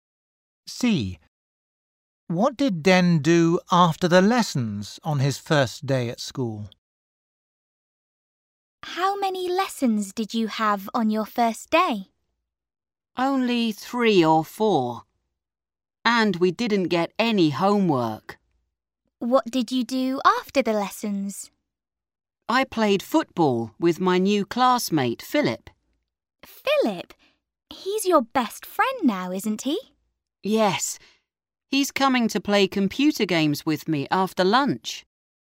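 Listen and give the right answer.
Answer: He played football with his new classmate, Philip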